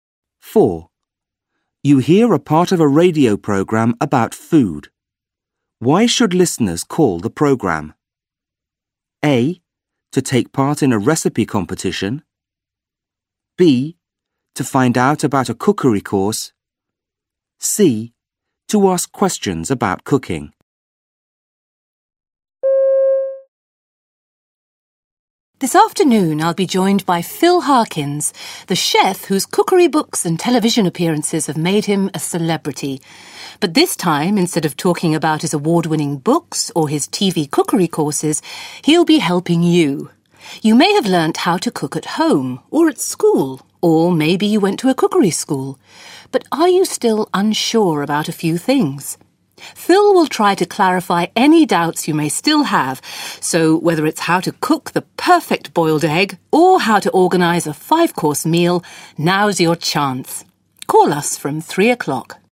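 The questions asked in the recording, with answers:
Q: Why should listeners call the program?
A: C: To ask questions about cooking.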